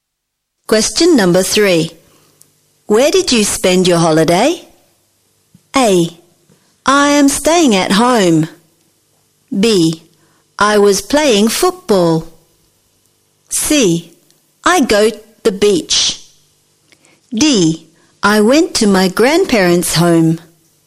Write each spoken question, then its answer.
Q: Where did you spend your holiday?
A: Jawabannya adalah D. I went to my grandparents' home.